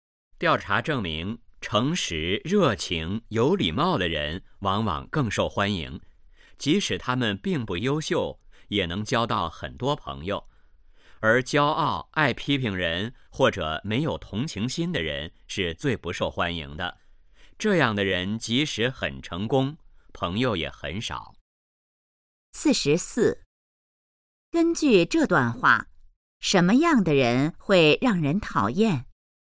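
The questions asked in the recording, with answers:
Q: 根据这段话,什么样的人会让人讨厌?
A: 骄傲、爱批评人或者没有同情心的人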